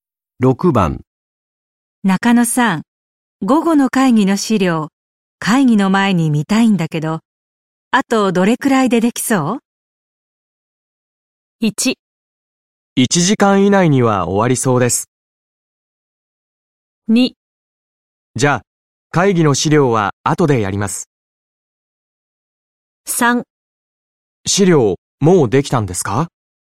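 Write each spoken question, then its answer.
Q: 中野さん、午後の会議の資料、会議の前に見たいんだけど、あとどれくらいでできそう?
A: 1: 1時間以内には終わりそうです。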